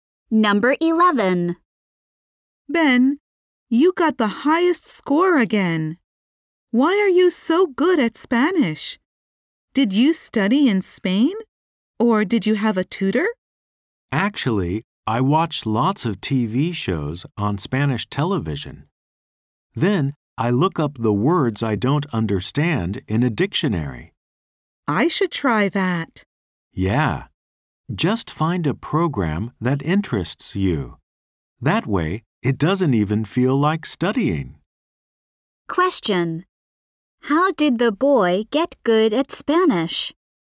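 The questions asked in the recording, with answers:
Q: How did the boy get good at Spanish?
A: By watching Spanish TV shows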